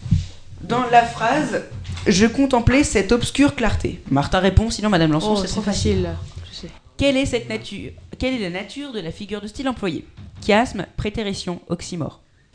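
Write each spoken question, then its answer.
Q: Quelle est la nature de la figure de style employée ?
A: oxymore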